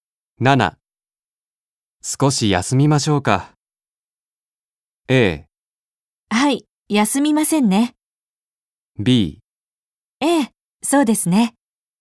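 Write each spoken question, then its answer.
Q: 少し休みましょうか。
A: B: ええ、そうですね。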